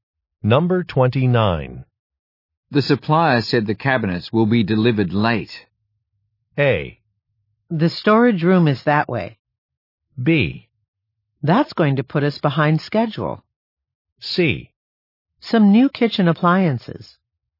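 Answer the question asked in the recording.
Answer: B: That's going to put us behind schedule.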